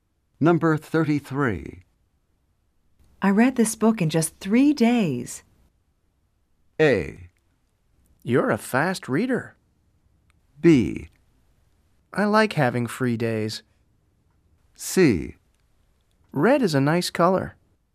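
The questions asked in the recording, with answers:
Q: I read this book in just three days.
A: A: You're a fast reader.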